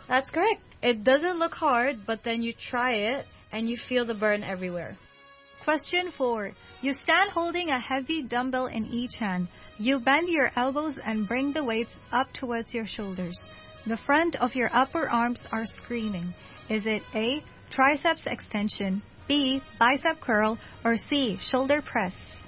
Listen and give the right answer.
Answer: Bicep curl.